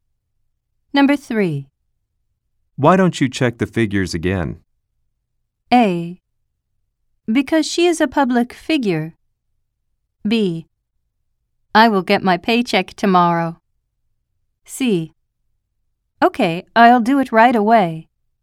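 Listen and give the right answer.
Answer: C: Okay, I'll do it right away.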